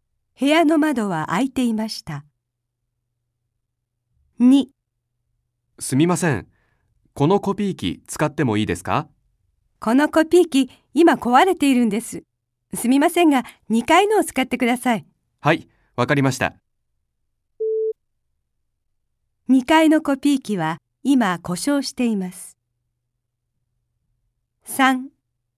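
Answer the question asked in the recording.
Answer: 正しくない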